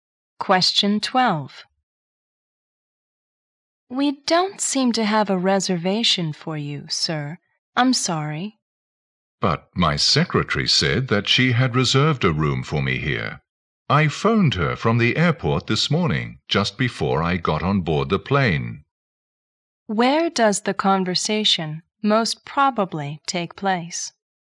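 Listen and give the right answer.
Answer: At a hotel (front desk).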